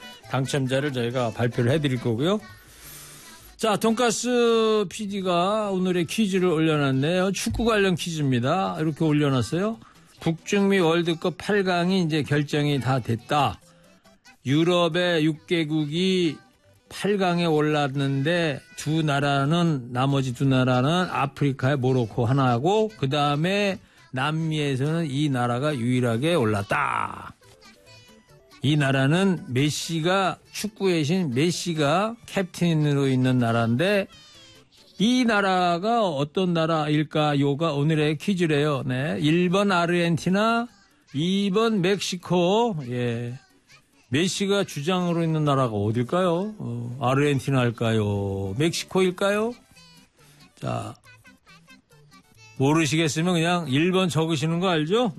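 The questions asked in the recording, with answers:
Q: 메시가 주장으로 있는 나라가 어딜까요?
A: 1번: 아르헨티나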